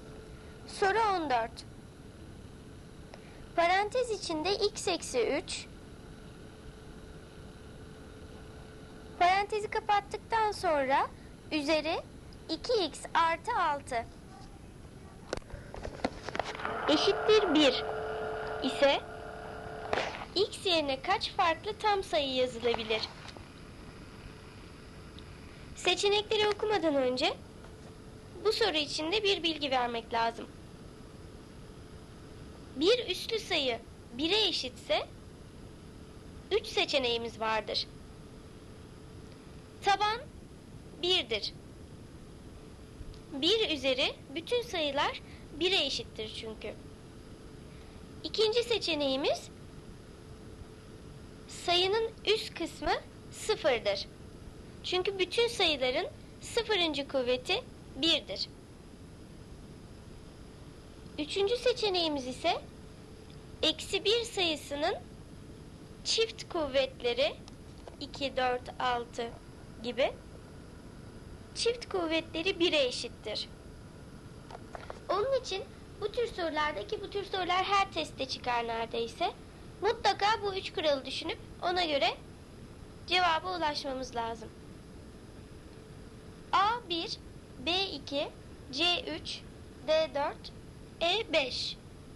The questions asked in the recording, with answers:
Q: Eşittir 1 ise x yerine kaç farklı tam sayı yazılabilir?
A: Doğru cevap C 3.